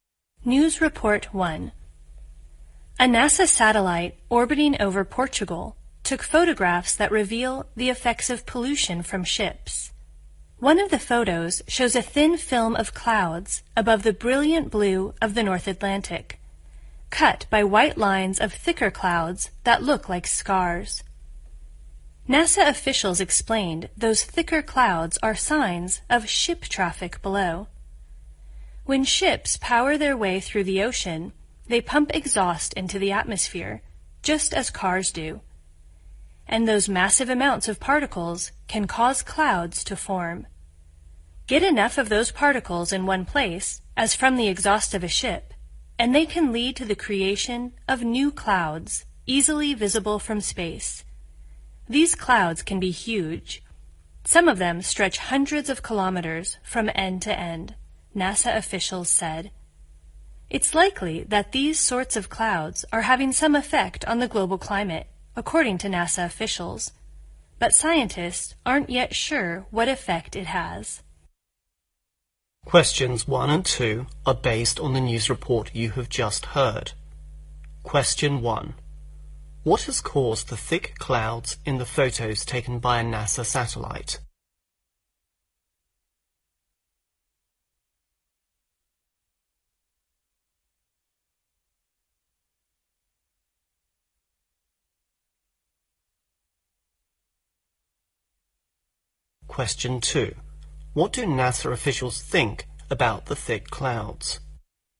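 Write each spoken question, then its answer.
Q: What has caused the thick clouds in the photos taken by a NASA satellite?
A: Exhaust from ships

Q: What do NASA officials think about the thick clouds?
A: They likely have some effect on the global climate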